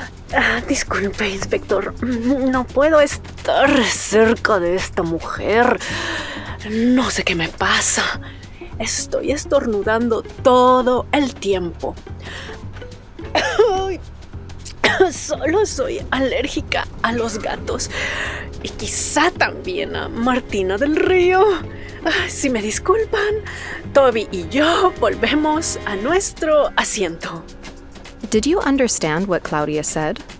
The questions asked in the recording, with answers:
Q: Did you understand what Claudia said?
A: Soy alérgica a los gatos.